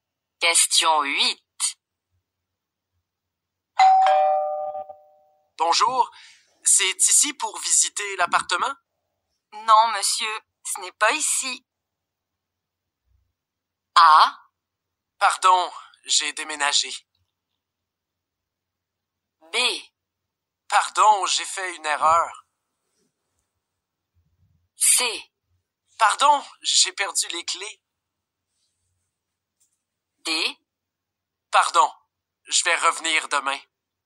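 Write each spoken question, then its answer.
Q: Non, monsieur, ce n'est pas ici.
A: B: Pardon, j'ai fait une erreur.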